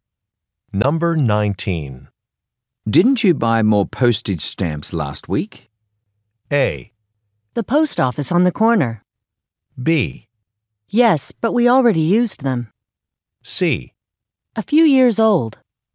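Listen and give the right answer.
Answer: B: Yes, but we already used them.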